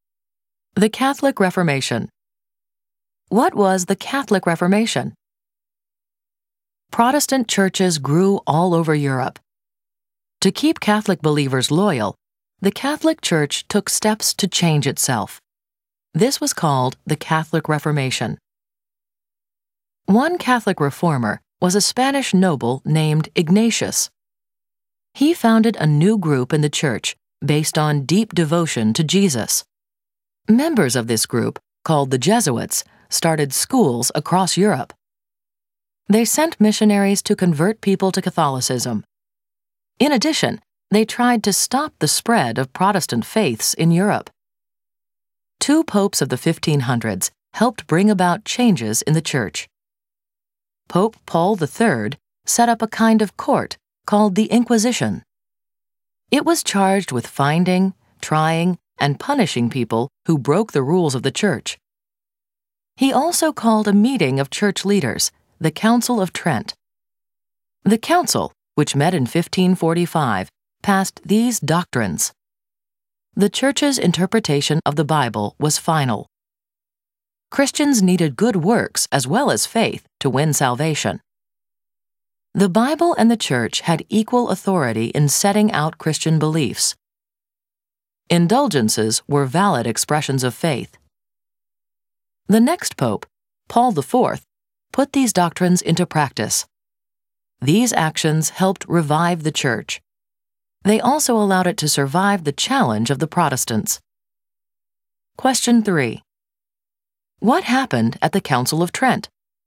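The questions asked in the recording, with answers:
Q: What happened at the Council of Trent?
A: Church leaders met in 1545 and passed doctrines: the church's reading of the Bible was final, good works and faith were both needed for salvation, the Bible and the church had equal authority, and indulgences were valid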